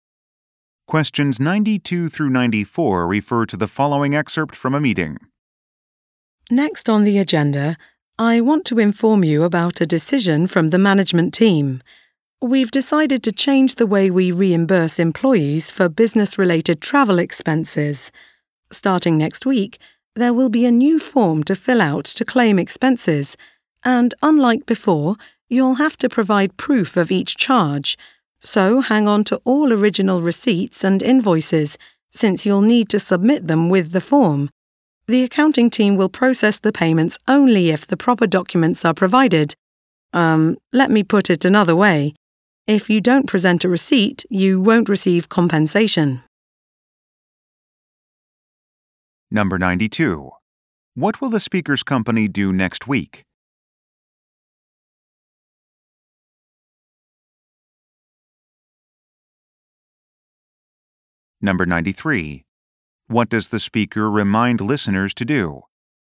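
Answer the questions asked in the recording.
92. Introduce a new expense reimbursement form
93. Keep all original receipts and invoices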